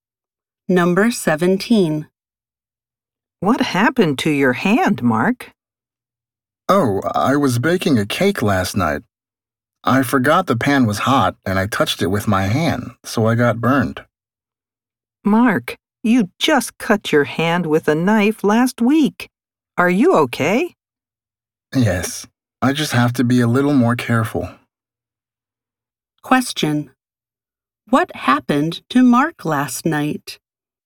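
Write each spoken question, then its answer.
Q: What happened to Mark last night?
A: He burned his hand on a hot pan while baking a cake.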